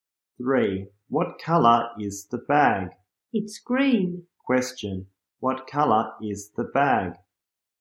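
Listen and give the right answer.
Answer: Green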